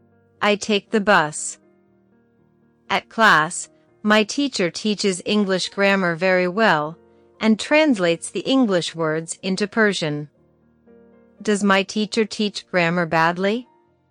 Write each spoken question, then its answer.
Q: Does my teacher teach grammar badly?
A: No, she doesn't. She teaches very well.